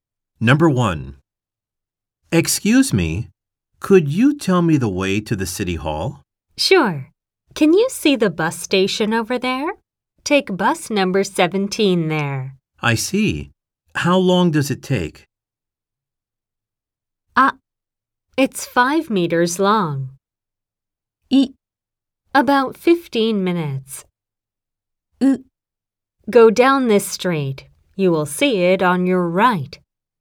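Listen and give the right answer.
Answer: イ: About 15 minutes.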